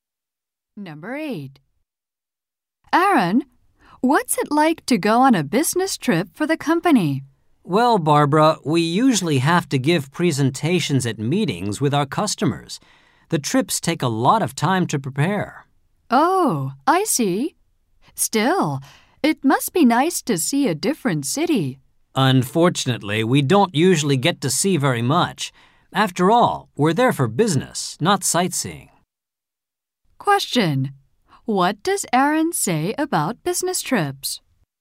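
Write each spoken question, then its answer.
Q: What does Aaron say about business trips?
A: They don't get to see much of the city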